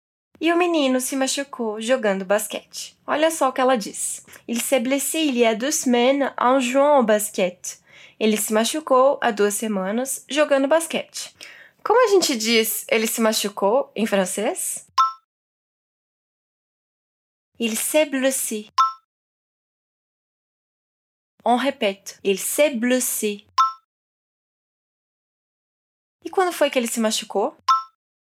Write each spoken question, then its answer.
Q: E quando foi que ele se machucou?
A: Il y a deux semaines.